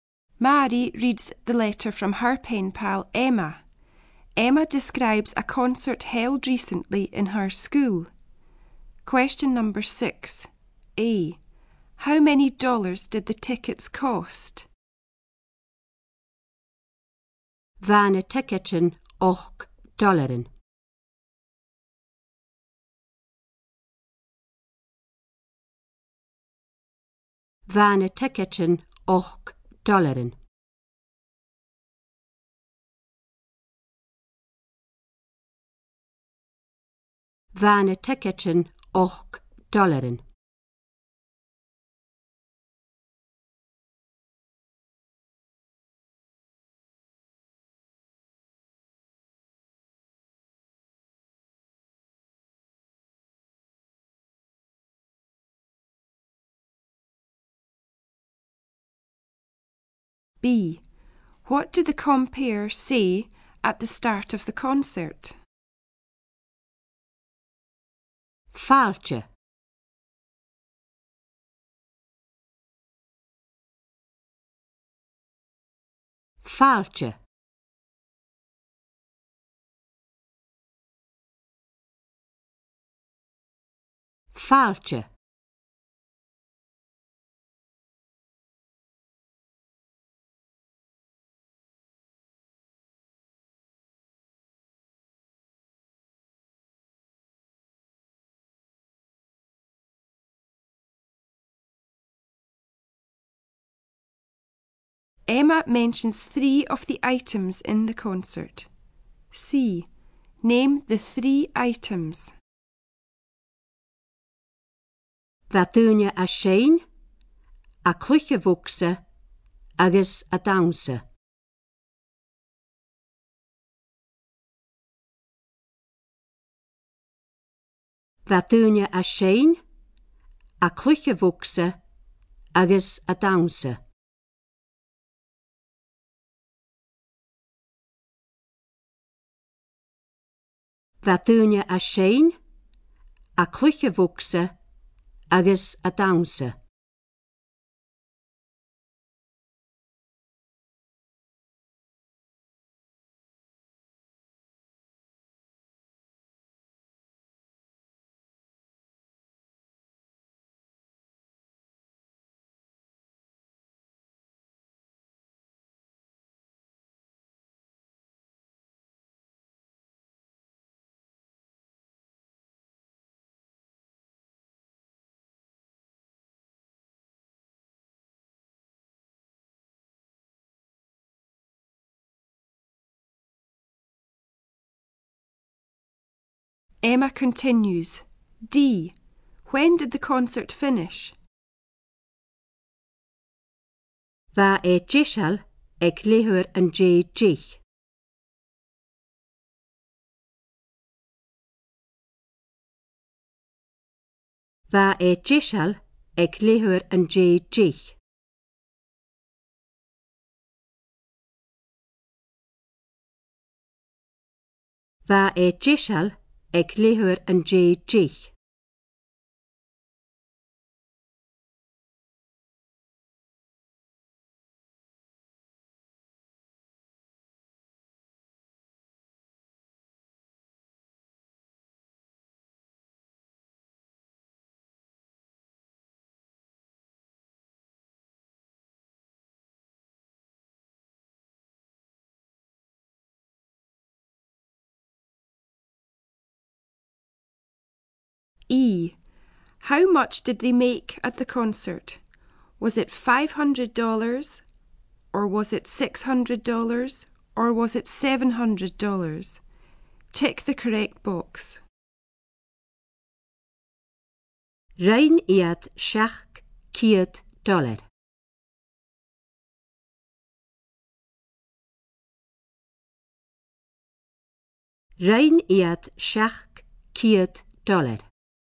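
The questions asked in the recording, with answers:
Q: How many dollars did the tickets cost?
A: Eight dollars

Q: What did the compere say at the start of the concert?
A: Welcome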